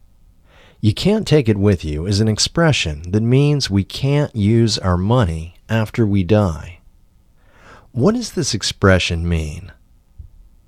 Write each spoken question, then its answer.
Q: What does this expression mean?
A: This expression means we can't use our money after we die.